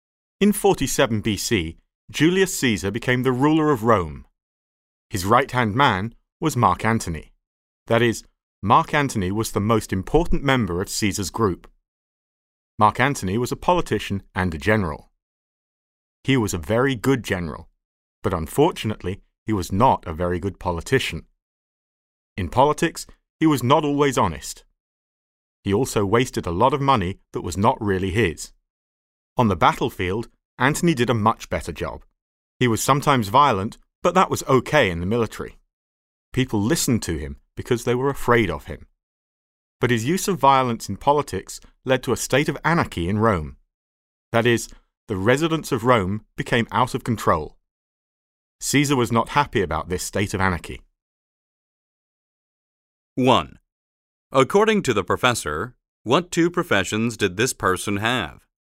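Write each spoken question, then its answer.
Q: According to the professor, what two professions did this person have?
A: Politician and general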